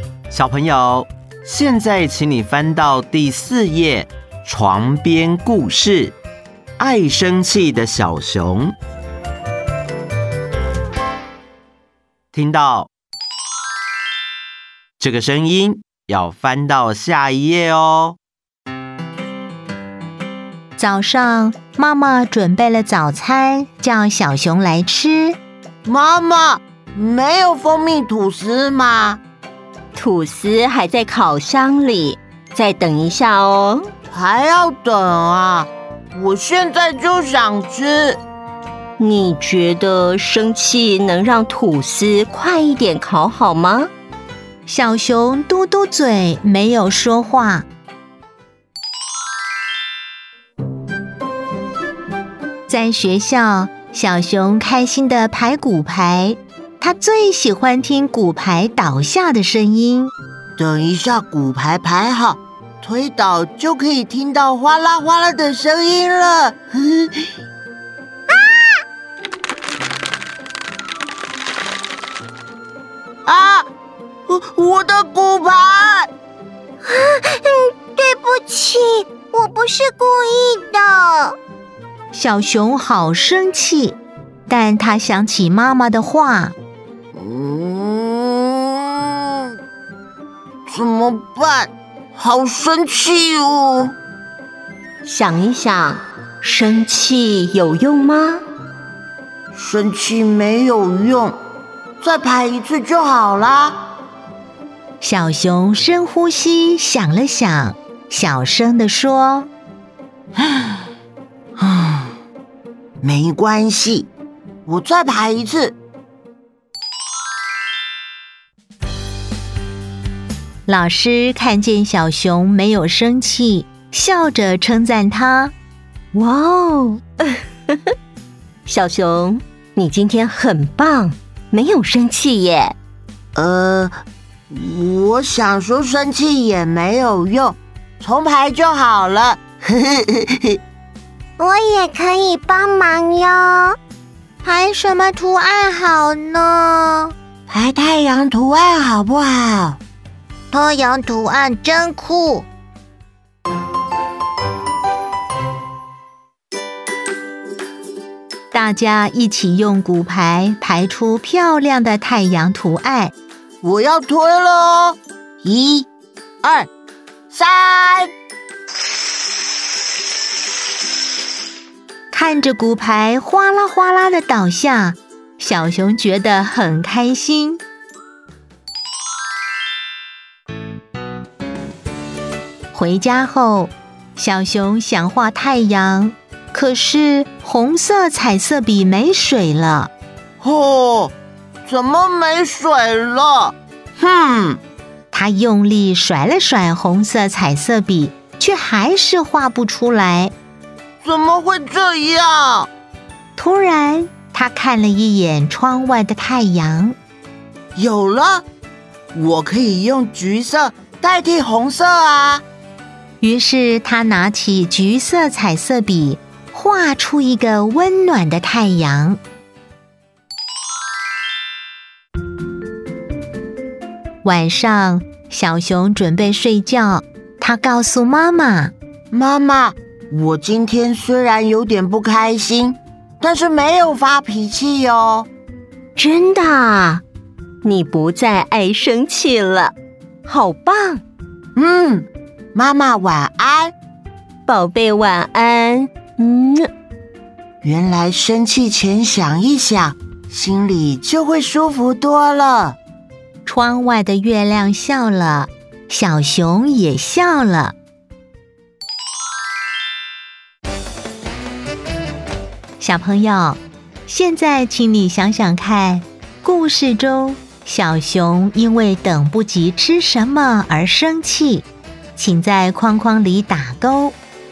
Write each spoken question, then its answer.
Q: 故事中小熊因为等不及吃什么而生气,请在框框里打勾。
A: 蜂蜜吐司。